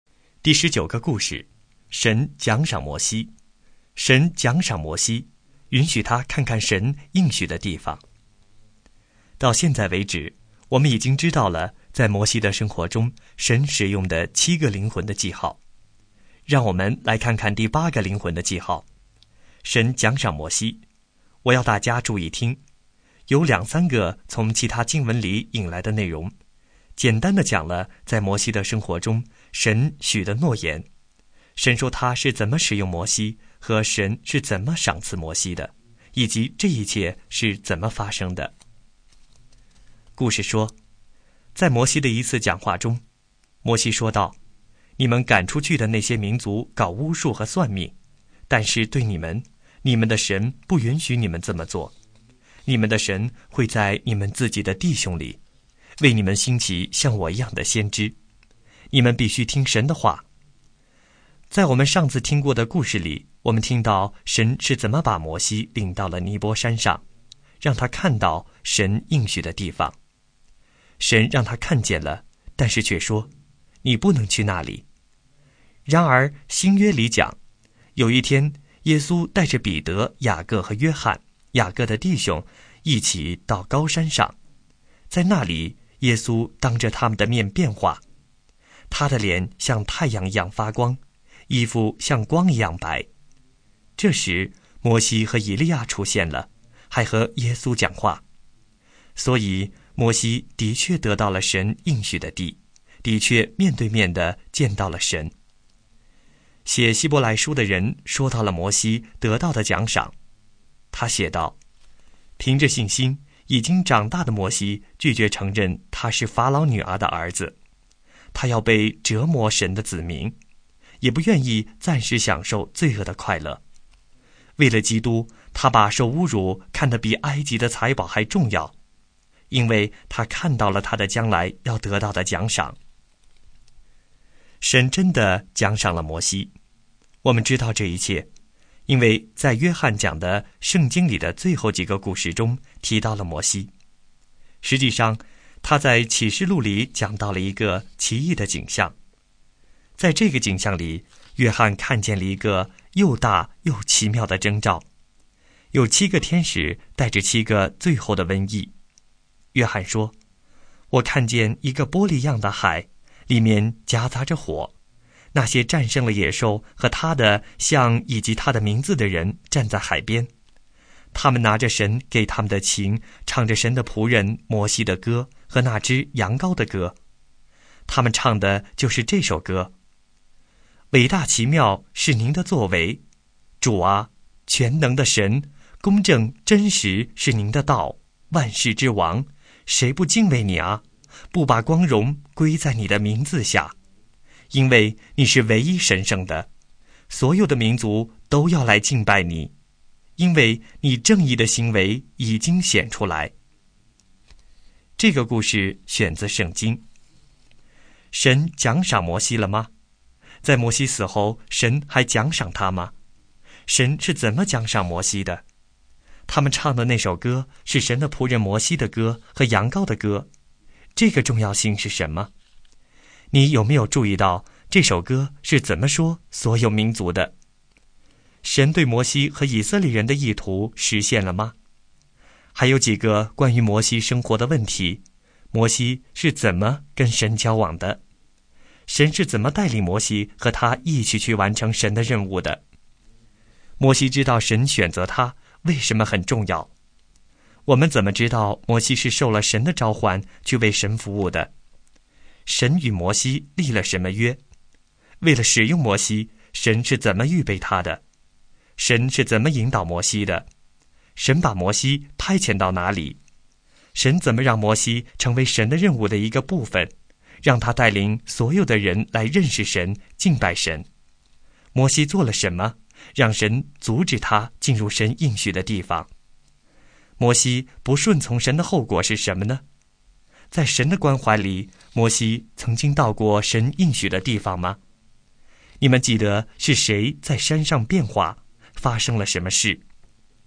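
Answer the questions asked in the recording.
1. 奖赏了
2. 是的,让他在山上与耶稣见面,并在启示录中被提到
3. 让他看到并最终得到神应许的地方,面对面见到神
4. 到过,在耶稣变化的高山上
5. 耶稣变化,脸像太阳发光,衣服白如光,摩西和以利亚出现与他讲话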